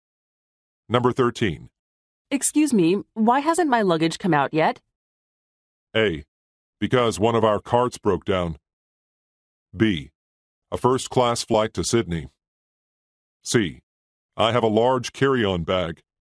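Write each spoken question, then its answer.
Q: Excuse me, why hasn't my luggage come out yet?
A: A: Because one of our carts broke down.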